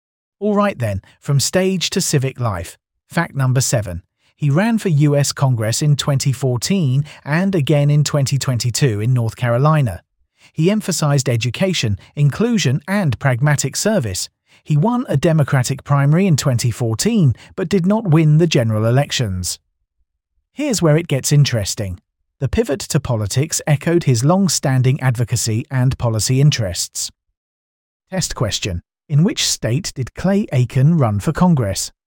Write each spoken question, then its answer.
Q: in which state did Clay Aiken run for Congress?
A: North Carolina.